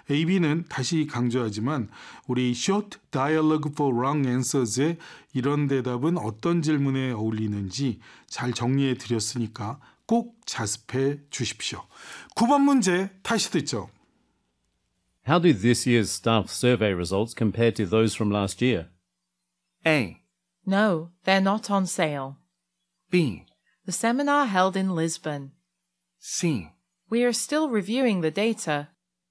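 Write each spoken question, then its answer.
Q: How do this year's staff survey results compare to those from last year?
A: C: We are still reviewing the data.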